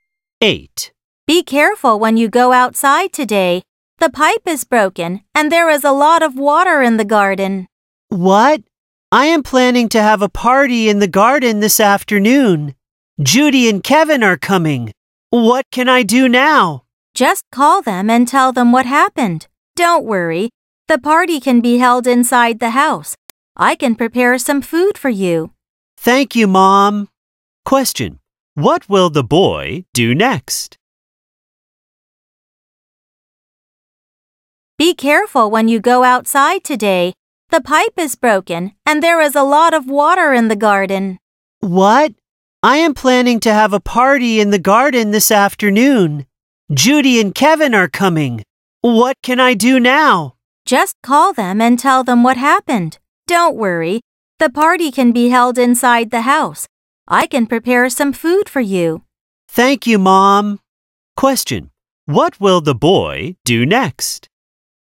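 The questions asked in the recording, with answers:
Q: What will the boy do next?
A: Call Judy and Kevin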